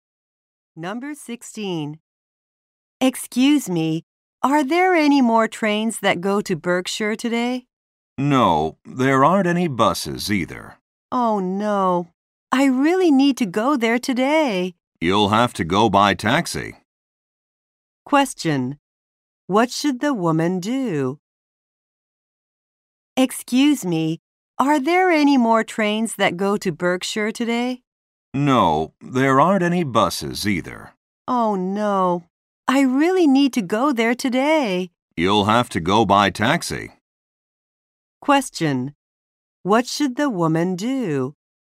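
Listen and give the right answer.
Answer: Take a taxi.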